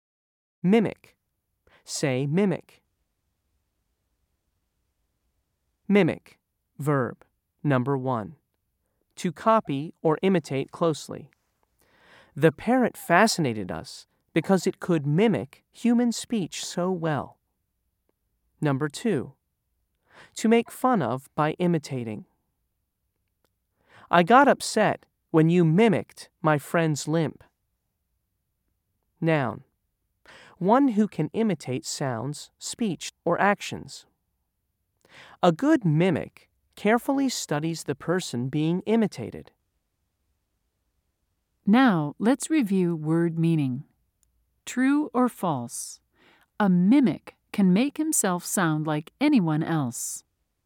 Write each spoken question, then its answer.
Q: True or false? A mimic can make himself sound like anyone else.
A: If you said true, you are correct.